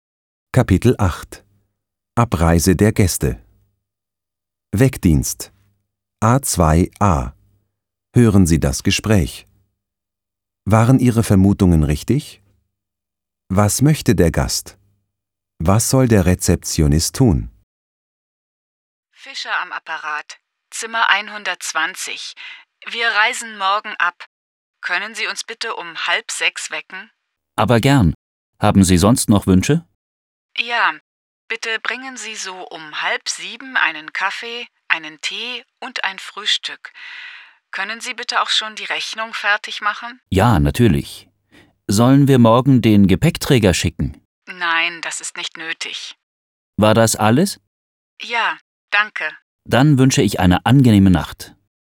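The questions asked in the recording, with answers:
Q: Was möchte der Gast?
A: Um 5:30 geweckt werden, um 6:30 Kaffee, Tee und Frühstück, und die Rechnung fertig haben

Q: Was soll der Rezeptionist tun?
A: Den Gast um 5:30 wecken, um 6:30 Kaffee, Tee und Frühstück bringen und die Rechnung fertig machen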